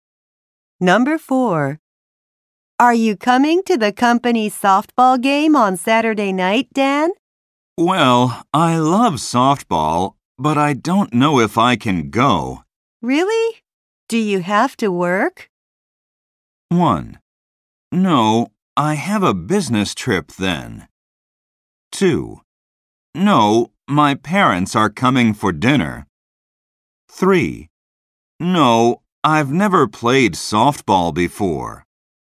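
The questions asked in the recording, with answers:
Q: Really? Do you have to work?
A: 2: No, my parents are coming for dinner.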